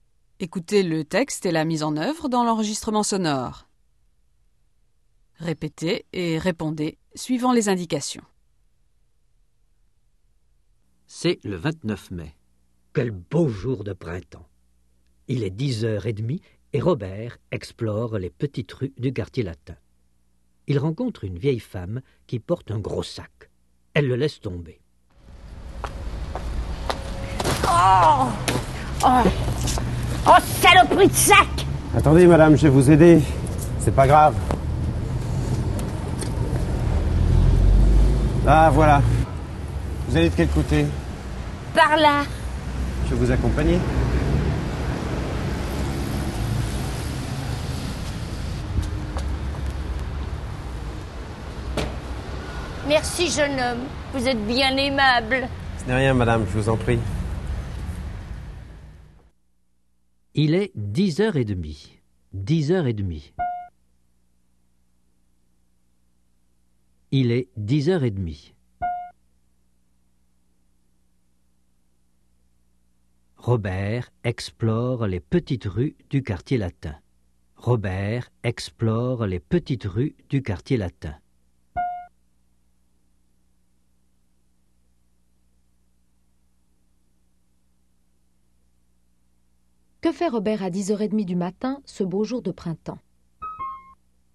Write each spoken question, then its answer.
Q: Que fait Robert à 10h30 du matin, ce beau jour de printemps?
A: Il explore les petites rues du quartier latin.